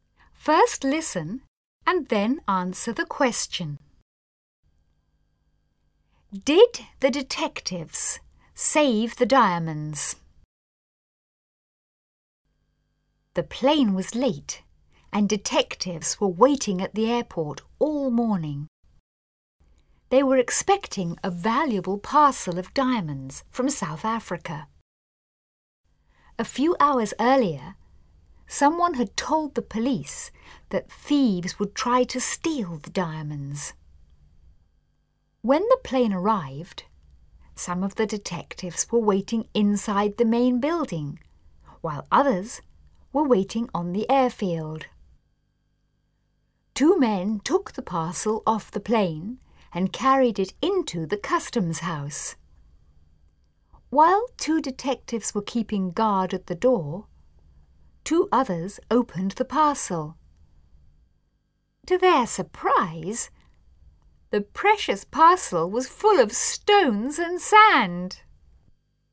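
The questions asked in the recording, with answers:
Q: Did the detectives save the diamonds?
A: No, the parcel was full of stones and sand.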